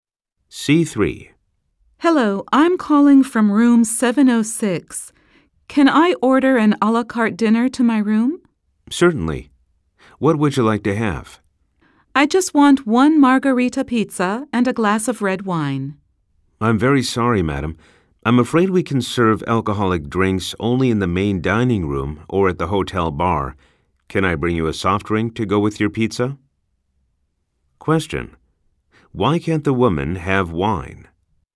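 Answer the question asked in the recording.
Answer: Alcoholic drinks are served only in the main dining room or at the hotel bar, not to rooms.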